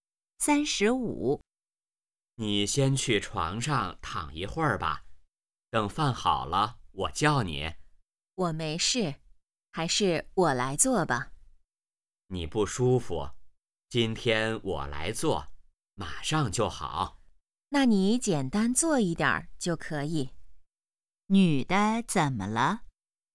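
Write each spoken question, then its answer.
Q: 女的怎么了?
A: 身体不舒服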